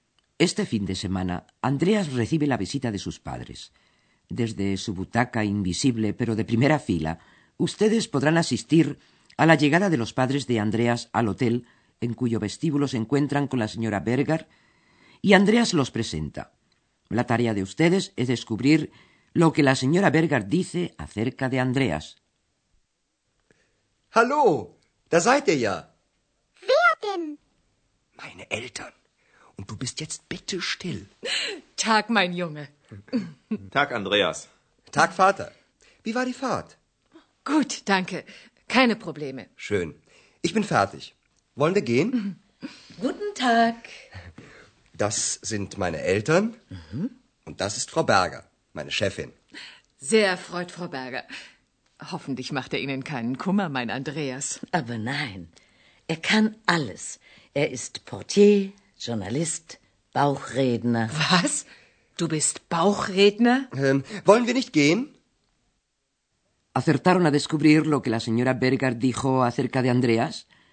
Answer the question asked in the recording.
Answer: La directora del hotel elogió al bueno de Andreas y lo hizo enumerando sus diversísimas ocupaciones.